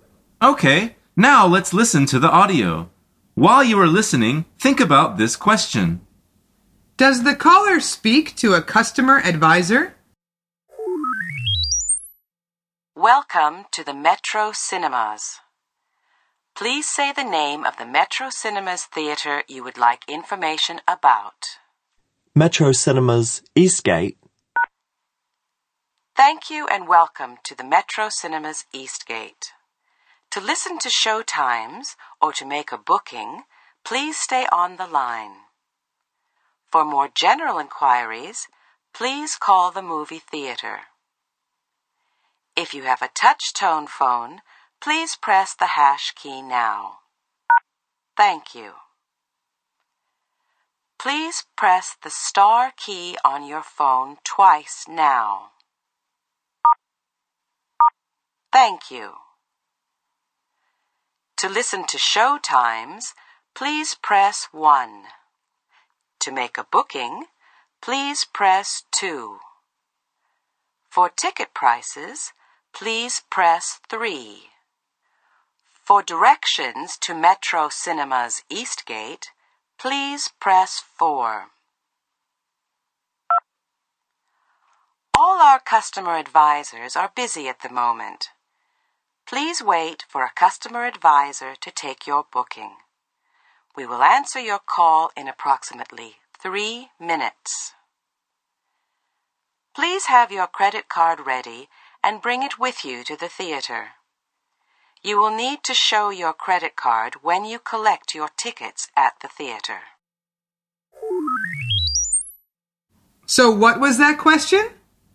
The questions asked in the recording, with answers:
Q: Does the caller speak to a customer advisor?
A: The answer is no. All the customer advisors are busy.